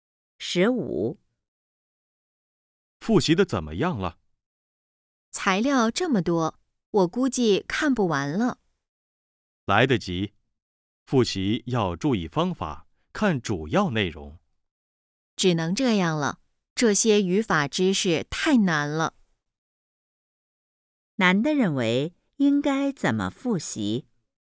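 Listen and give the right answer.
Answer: 注意方法,看主要内容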